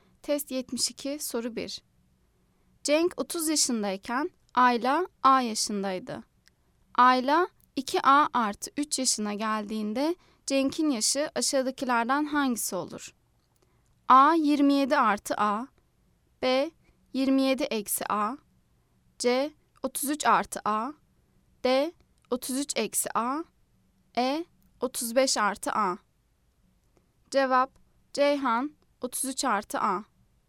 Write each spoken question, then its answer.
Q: Ayla 2A artı 3 yaşına geldiğinde Cenk'in yaşı aşağıdakilerden hangisi olur?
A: Cevap: Ceyhan 33 artı A.